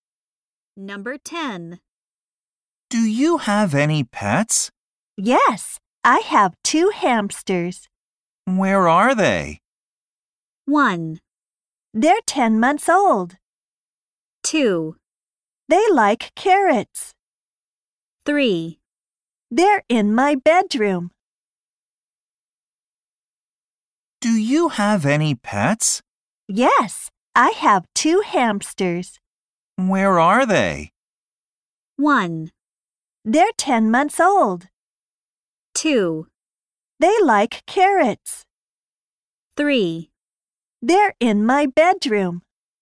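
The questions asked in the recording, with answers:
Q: Where are they?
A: 3: They're in my bedroom.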